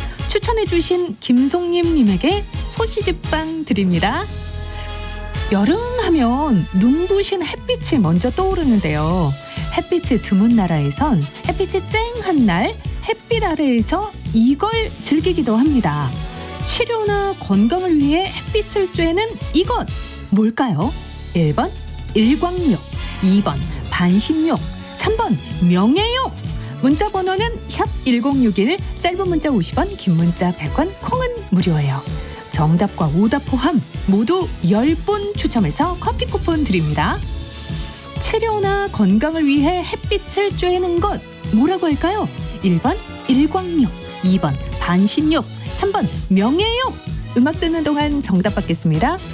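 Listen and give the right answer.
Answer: 1: 일광욕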